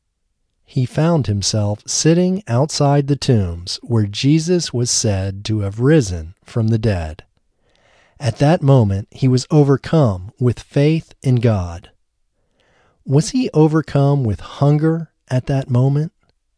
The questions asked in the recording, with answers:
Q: Was he overcome with hunger at that moment?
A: No, he wasn't overcome with hunger at that moment.